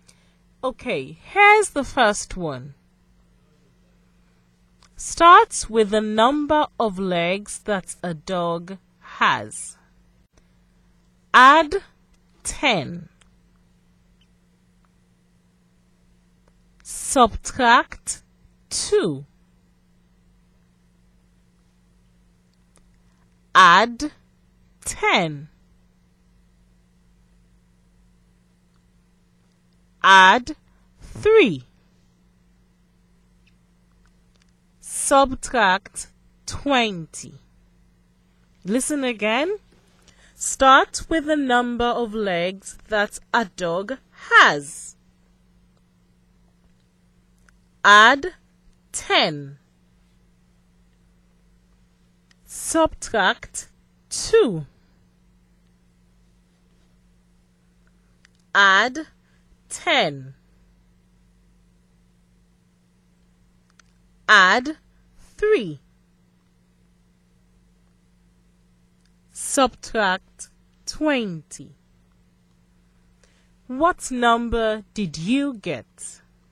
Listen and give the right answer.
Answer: The mystery number is 5.